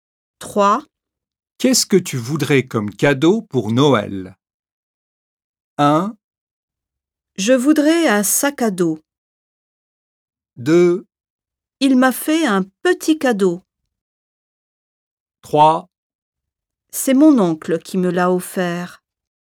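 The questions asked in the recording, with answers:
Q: Qu'est-ce que tu voudrais comme cadeau pour Noël?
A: 1: Je voudrais un sac à dos.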